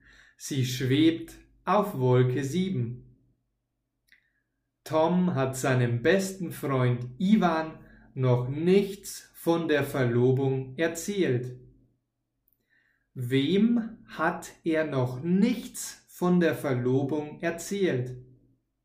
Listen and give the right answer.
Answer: Ivan. Er hat seinem besten Freund Ivan noch nichts von der Verlobung erzählt.